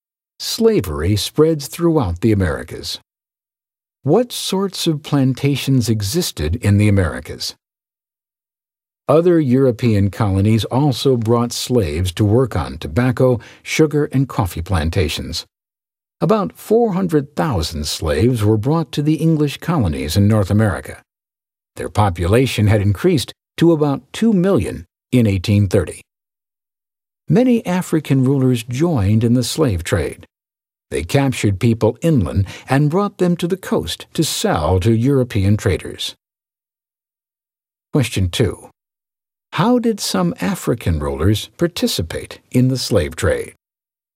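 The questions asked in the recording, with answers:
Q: How did some African rulers participate in the slave trade?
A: They captured people inland and sold them to European traders on the coast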